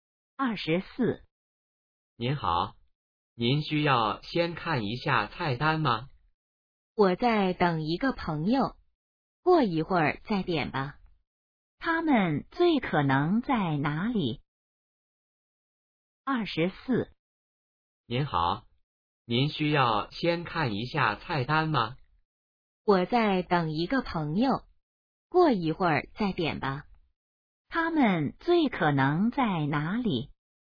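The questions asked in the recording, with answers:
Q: 他们最可能在哪里?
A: 饭馆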